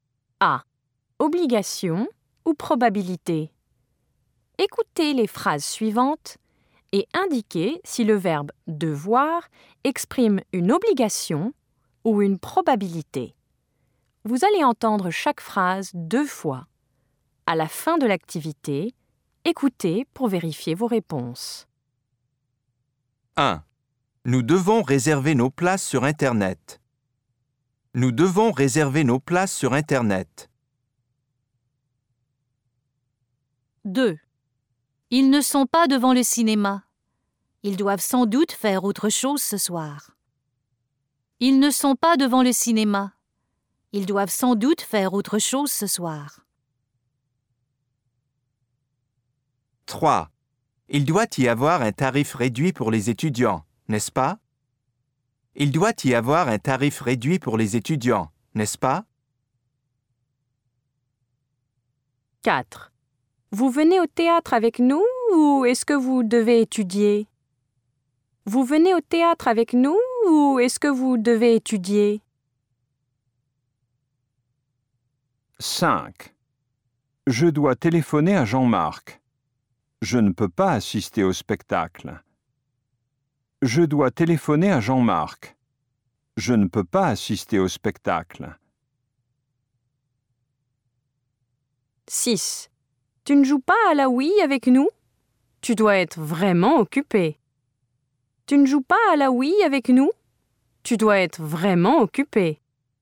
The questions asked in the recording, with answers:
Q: Nous devons réserver nos places sur Internet.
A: Une obligation.

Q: Ils ne sont pas devant le cinéma. Ils doivent sans doute faire autre chose ce soir.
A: Une probabilité.

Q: Il doit y avoir un tarif réduit pour les étudiants, n'est-ce pas?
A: Une probabilité.

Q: Vous venez au théâtre avec nous ou est-ce que vous devez étudier?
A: Une obligation.

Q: Je dois téléphoner à Jean-Marc. Je ne peux pas assister au spectacle.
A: Une obligation.

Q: Tu ne joues pas à la Wii avec nous? Tu dois être vraiment occupé.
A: Une probabilité.